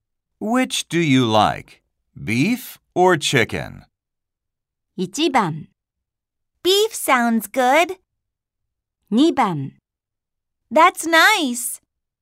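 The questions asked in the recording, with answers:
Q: Which do you like? Beef or chicken?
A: 1: Beef sounds good.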